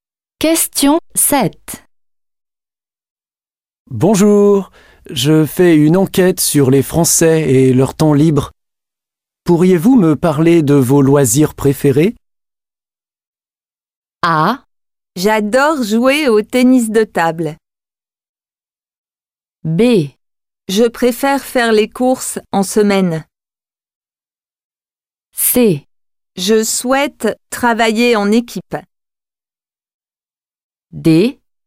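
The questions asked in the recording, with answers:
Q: Pourriez-vous me parler de vos loisirs préférés?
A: A: J'adore jouer au tennis de table.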